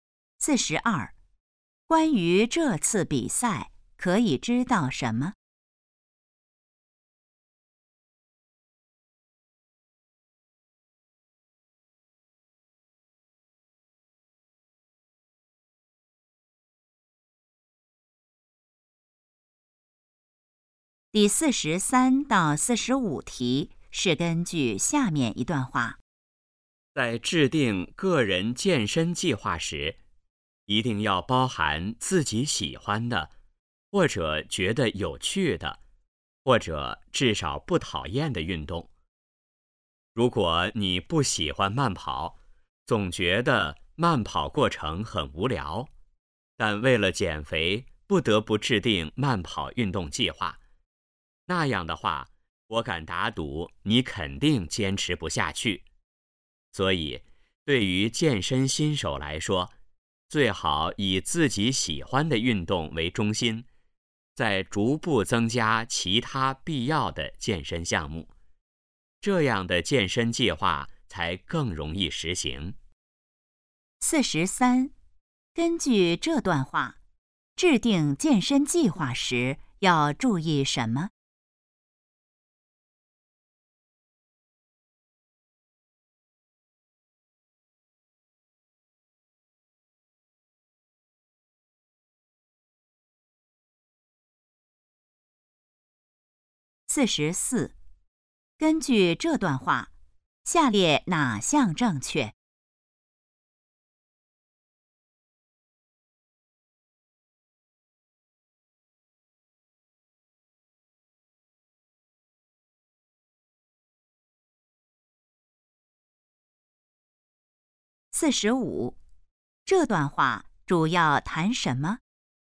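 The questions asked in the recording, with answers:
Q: 根据这段话,制定健身计划时要注意什么?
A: 包含自己喜欢的运动

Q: 这段话主要谈什么?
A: 怎样制定健身计划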